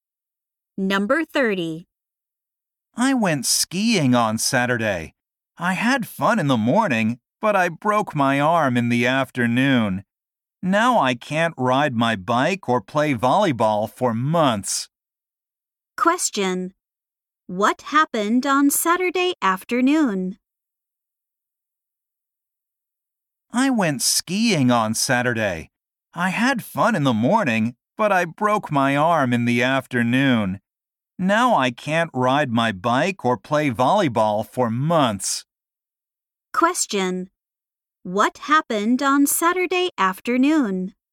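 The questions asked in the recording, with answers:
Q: What happened on Saturday afternoon?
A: The speaker broke his or her arm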